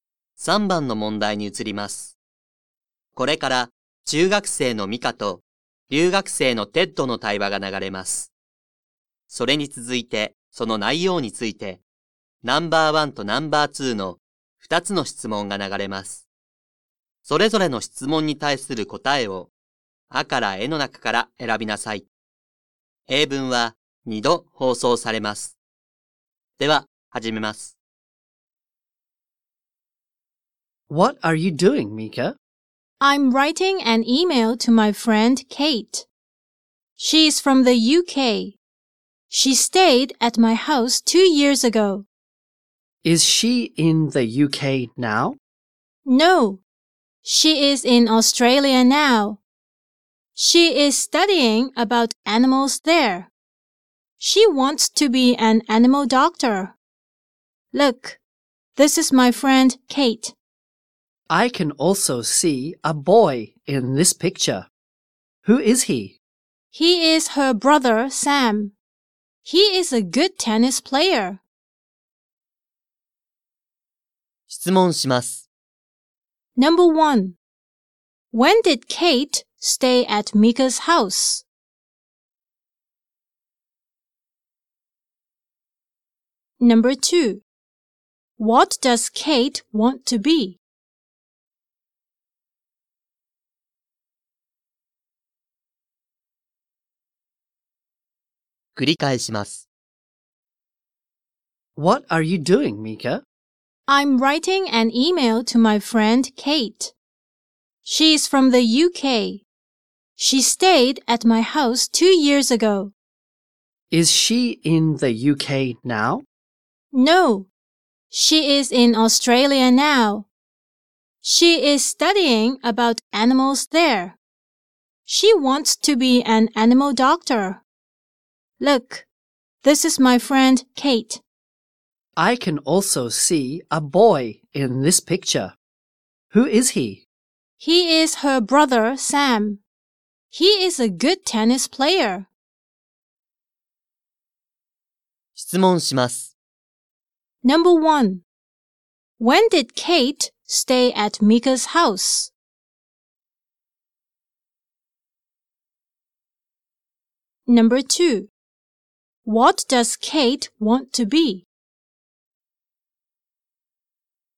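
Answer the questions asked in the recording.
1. Two years ago
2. An animal doctor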